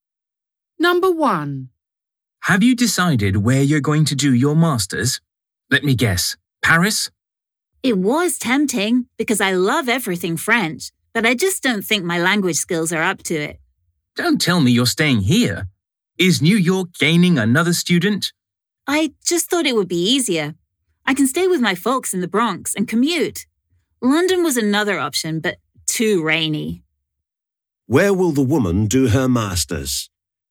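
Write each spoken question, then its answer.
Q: Where will the woman do her master's?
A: New York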